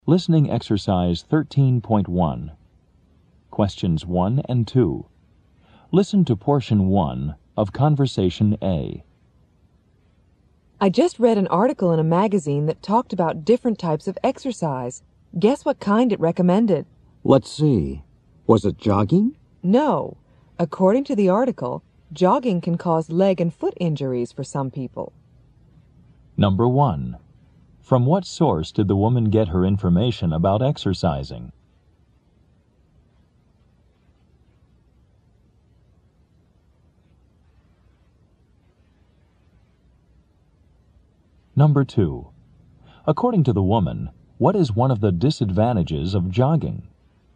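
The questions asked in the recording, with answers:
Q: From what source did the woman get her information about exercising?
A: A magazine article

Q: According to the woman, what is one of the disadvantages of jogging?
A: It can cause leg and foot injuries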